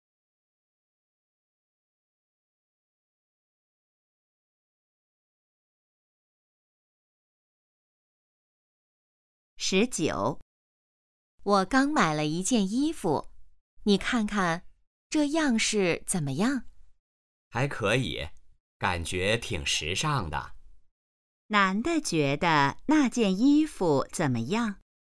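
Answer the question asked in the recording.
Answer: 挺时尚的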